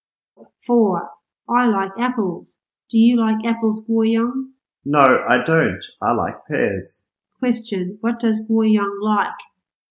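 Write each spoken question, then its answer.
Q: Question, what does Guoyang like?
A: Pears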